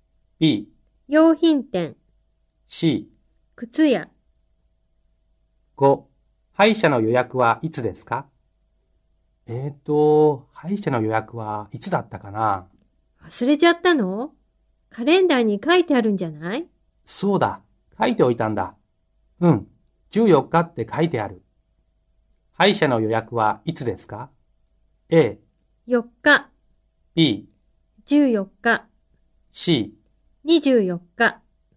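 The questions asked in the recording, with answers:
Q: 歯医者の予約はいつですか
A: B: 14日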